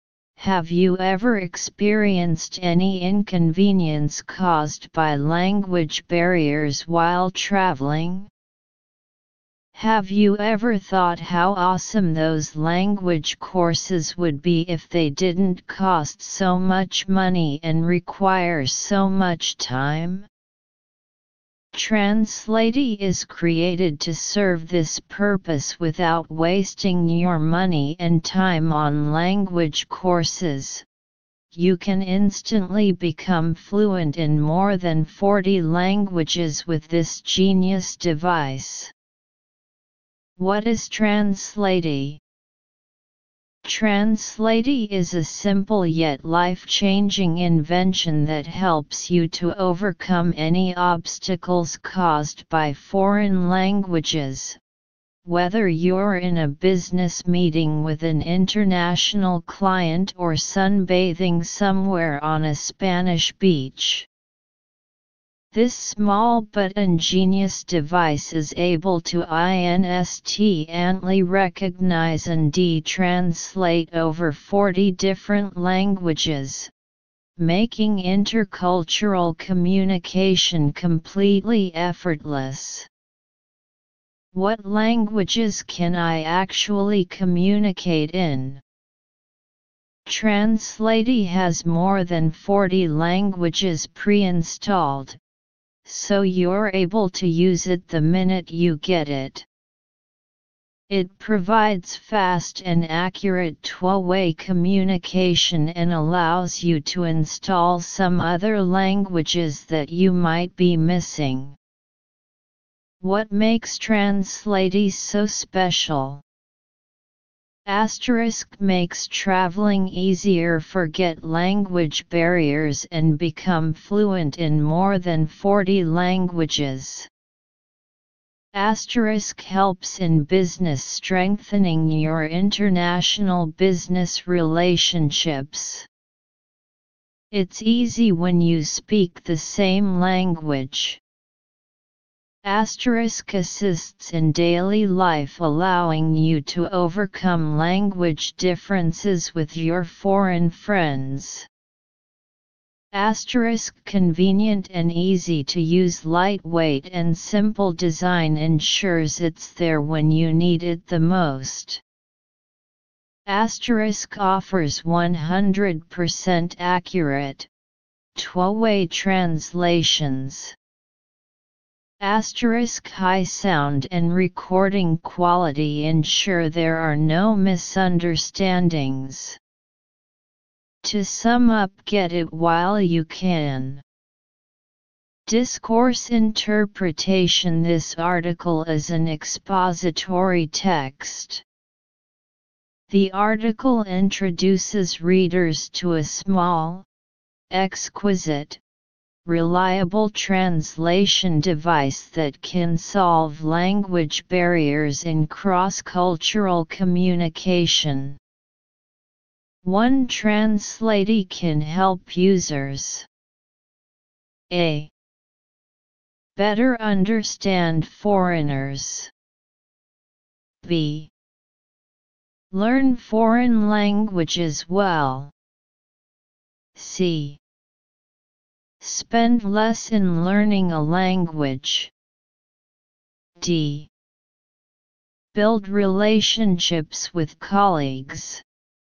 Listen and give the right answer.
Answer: So choose A. Answer, A.